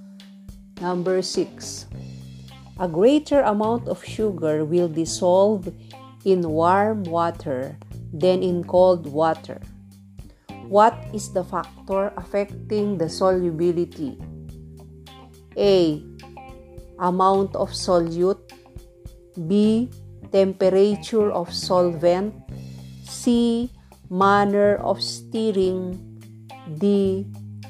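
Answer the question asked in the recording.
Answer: B: Temperature of solvent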